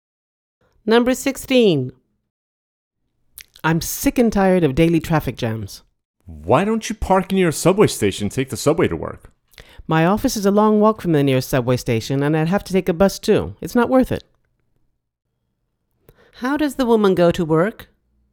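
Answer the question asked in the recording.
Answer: By car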